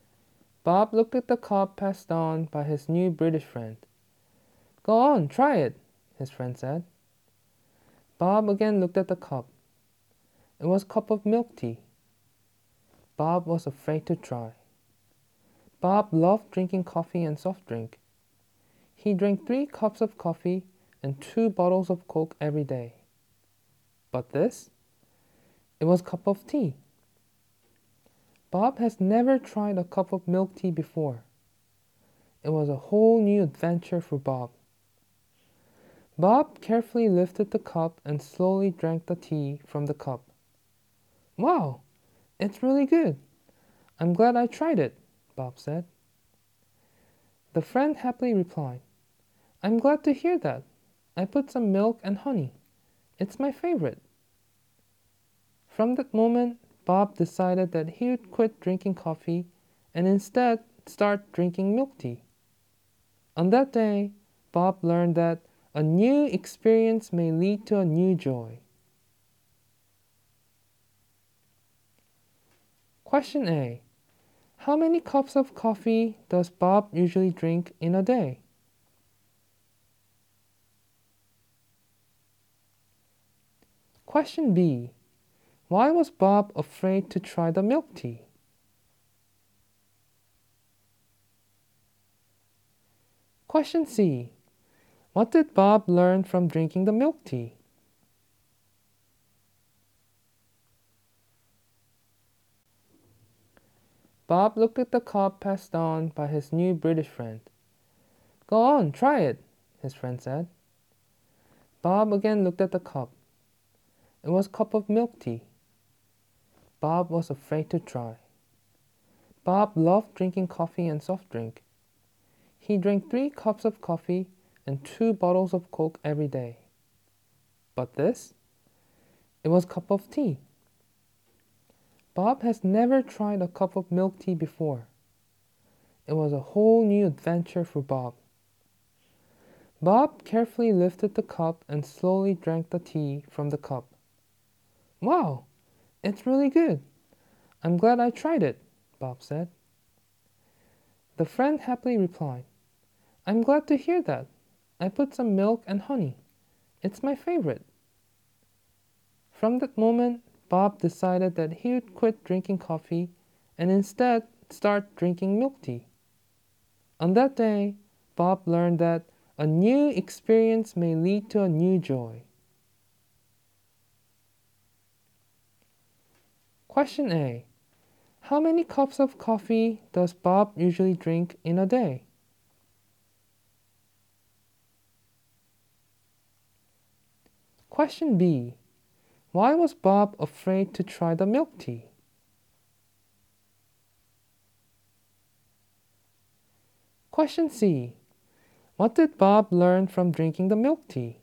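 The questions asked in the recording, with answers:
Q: How many cups of coffee does Bob usually drink in a day?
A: Three cups

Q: Why was Bob afraid to try the milk tea?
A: Because he had never tried milk tea before

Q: What did Bob learn from drinking the milk tea?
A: That a new experience may lead to a new joy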